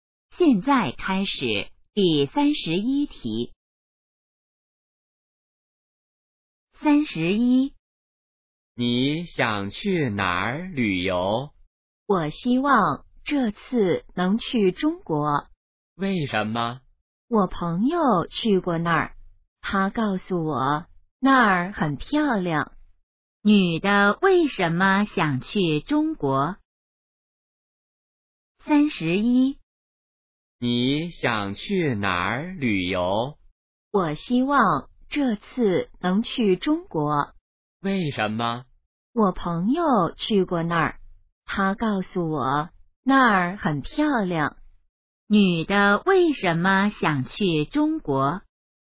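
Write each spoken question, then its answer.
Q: 女的为什么想去中国?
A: 朋友说那儿很漂亮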